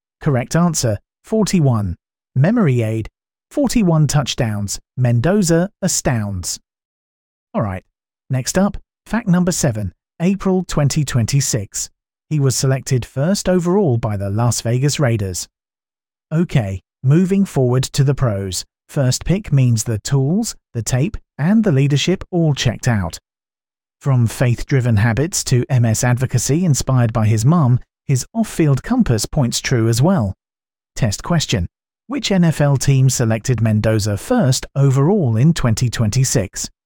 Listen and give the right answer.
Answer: Correct answer, Las Vegas Raiders.